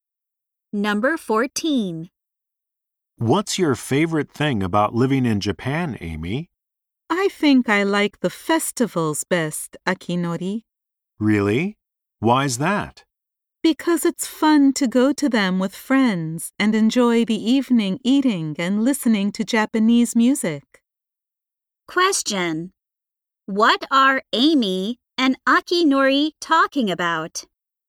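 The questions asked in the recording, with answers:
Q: What are Amy and Akinori talking about?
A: Japanese festivals.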